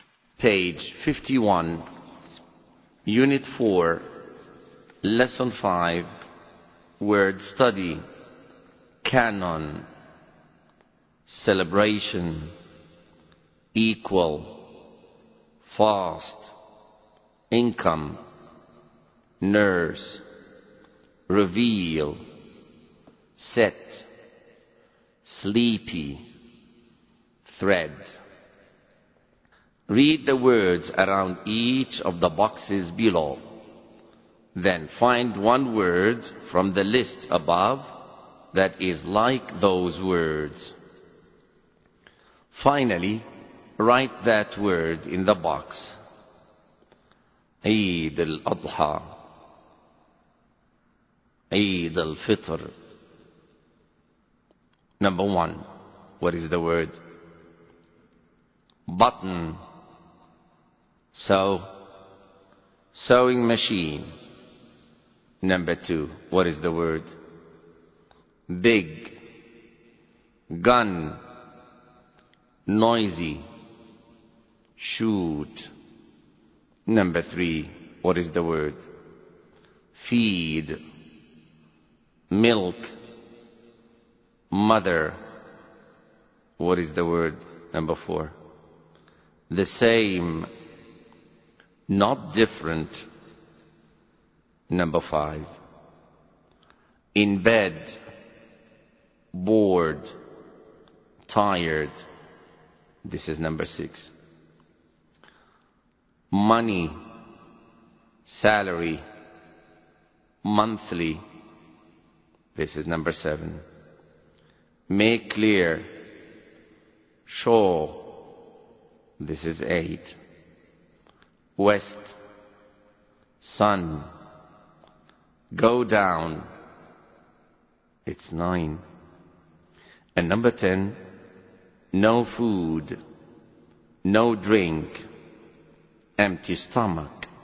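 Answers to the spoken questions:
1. celebration
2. thread
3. cannon
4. nurse
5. equal
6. sleepy
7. income
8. reveal
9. set
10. fast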